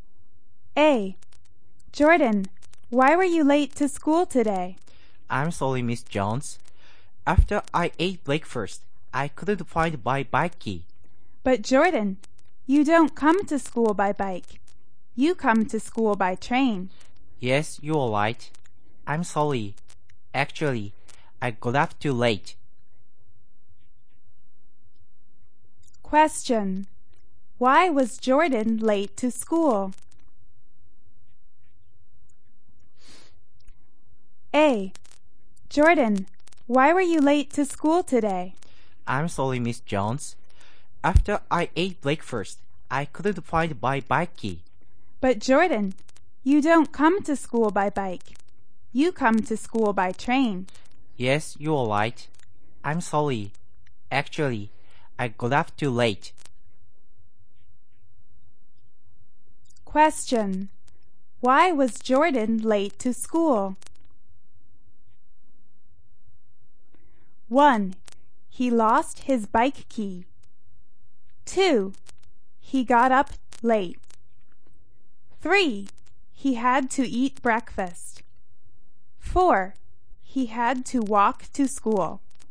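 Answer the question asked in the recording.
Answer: 2: He got up late.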